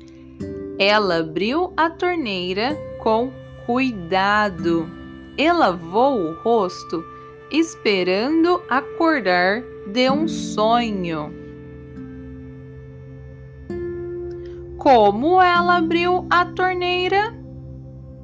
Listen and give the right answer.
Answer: Ela abriu a torneira com cuidado.